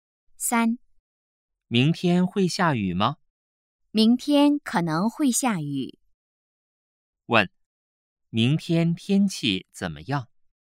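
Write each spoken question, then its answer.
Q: 问,明天天气怎么样?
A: 可能会下雨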